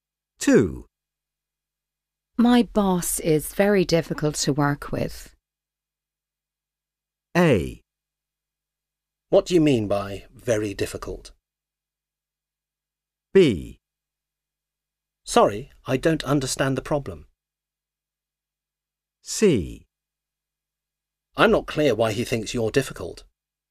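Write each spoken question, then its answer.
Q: My boss is very difficult to work with.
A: A: What do you mean by very difficult?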